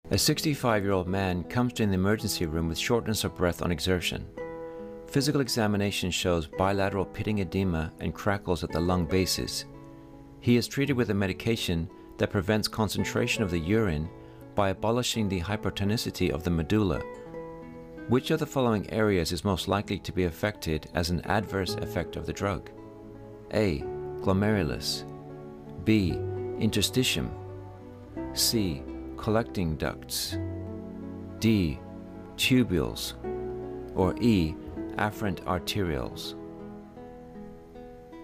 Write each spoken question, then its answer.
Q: Which of the following areas is most likely to be affected as an adverse effect of the drug?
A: And the answer is interstitium.